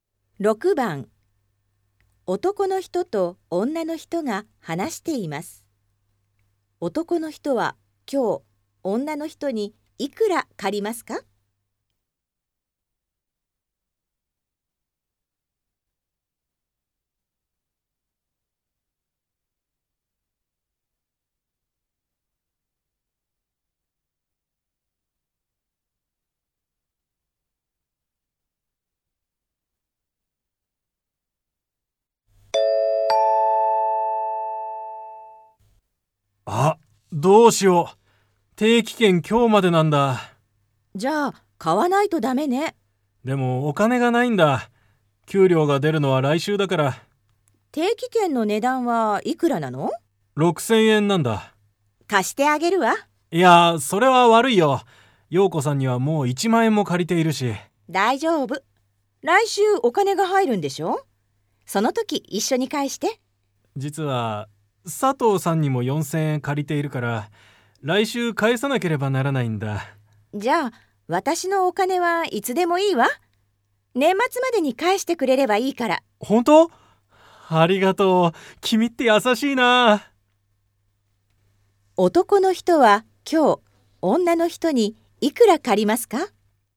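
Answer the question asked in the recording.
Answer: 6000円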